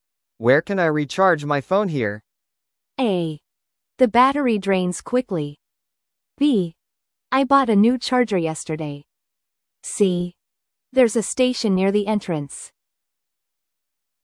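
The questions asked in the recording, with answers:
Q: Where can I recharge my phone here?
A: C: There's a station near the entrance.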